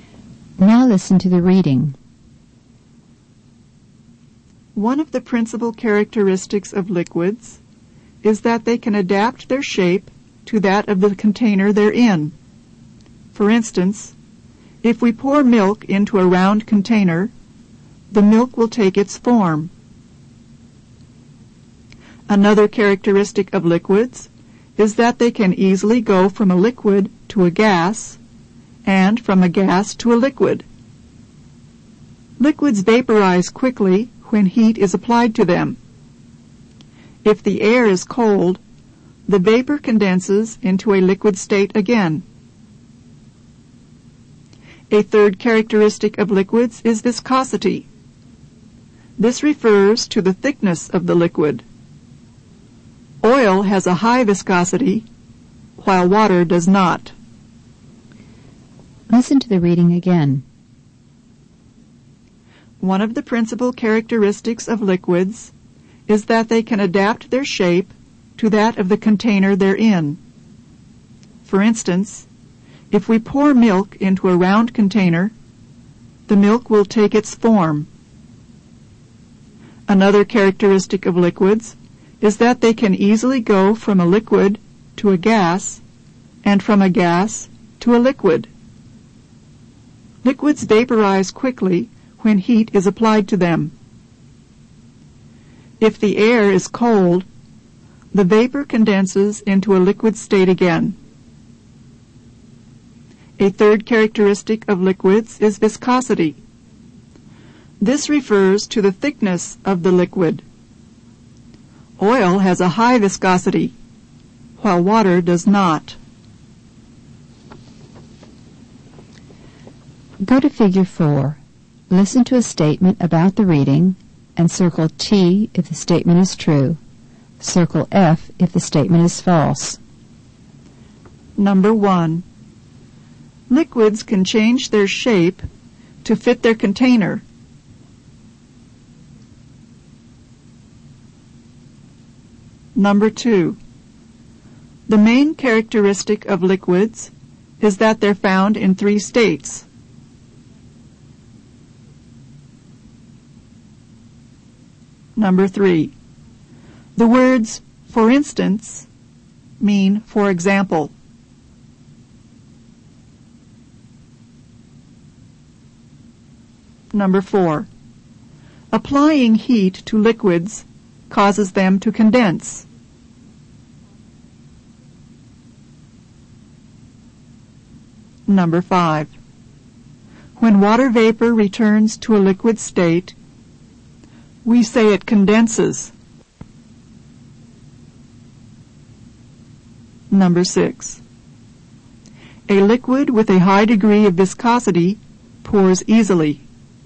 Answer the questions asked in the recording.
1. Number 1 is true.
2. Number 2 is false.
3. Number 3 is true.
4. Number 4 is false.
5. Number 5 is true.
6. Number 6 is false.